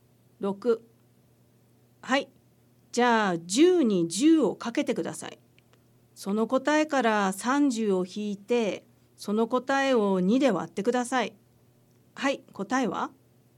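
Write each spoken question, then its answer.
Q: はい、答えは?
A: 35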